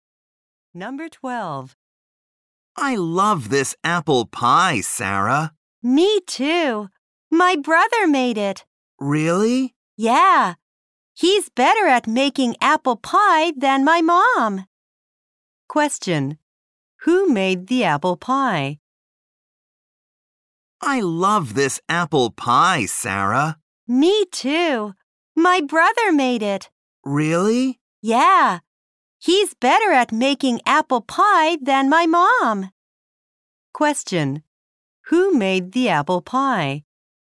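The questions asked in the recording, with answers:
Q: Who made the apple pie?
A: Sarah's brother.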